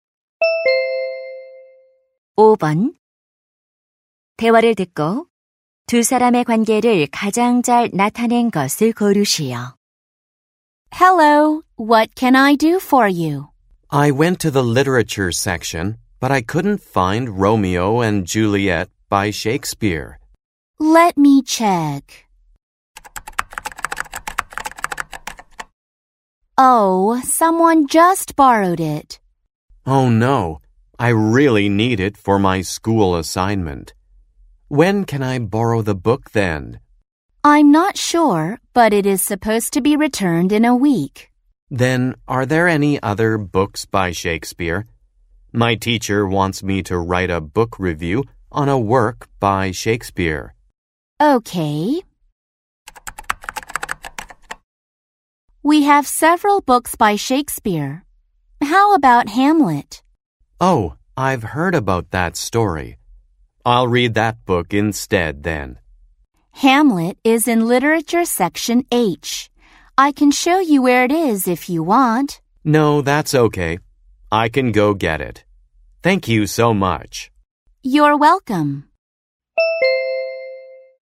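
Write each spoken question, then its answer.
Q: 대화를 듣고 두 사람의 관계를 가장 잘 나타낸 것을 고르시오.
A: 도서관 사서 - 학생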